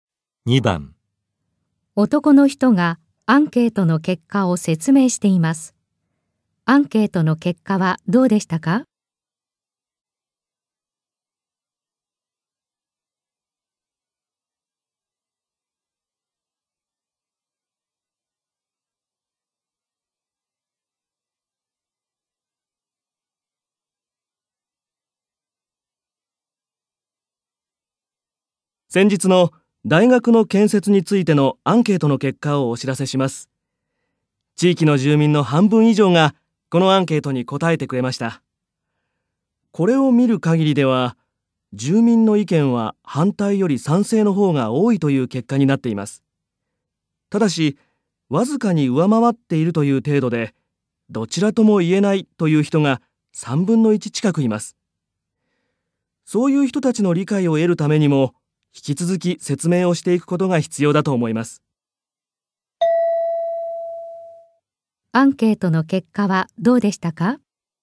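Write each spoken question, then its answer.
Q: アンケートの結果はどうでしたか?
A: 賛成が反対をわずかに上回った(どちらとも言えない人が3分の1近く)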